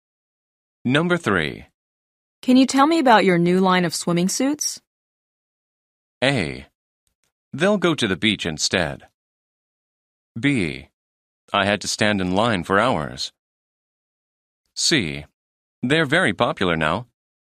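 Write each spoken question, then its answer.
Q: Can you tell me about your new line of swimming suits?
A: C: They're very popular now.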